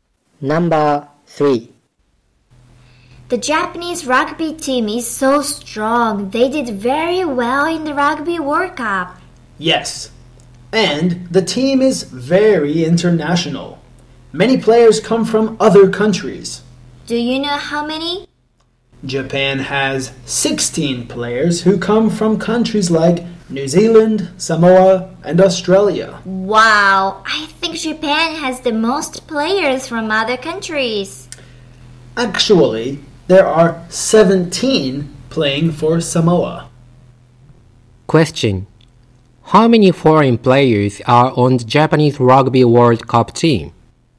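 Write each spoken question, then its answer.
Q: How many foreign players are on the Japanese Rugby World Cup team?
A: 16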